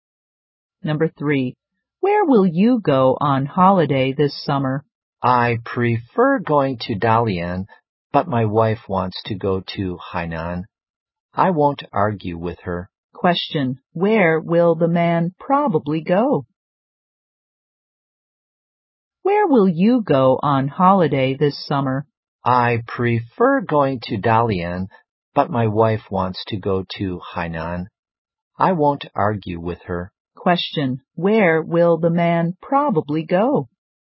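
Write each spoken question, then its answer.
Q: where will the man probably go?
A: Hainan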